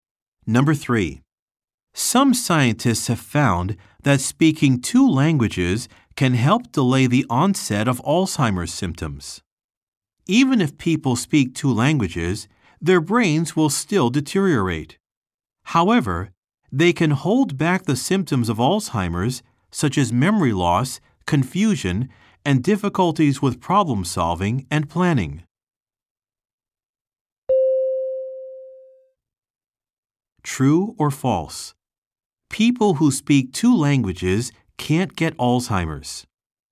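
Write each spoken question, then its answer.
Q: True or false? People who speak two languages can't get Alzheimer's.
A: False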